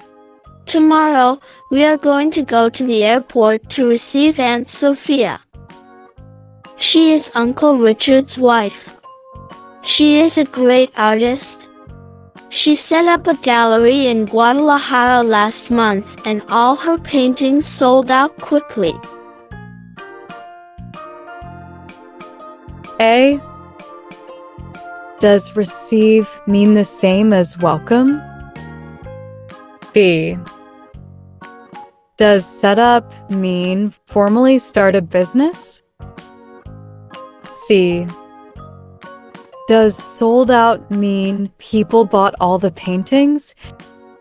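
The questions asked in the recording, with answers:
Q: Does receive mean the same as welcome?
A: Yes

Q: Does set up mean formally start a business?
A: Yes

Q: Does sold out mean people bought all the paintings?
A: Yes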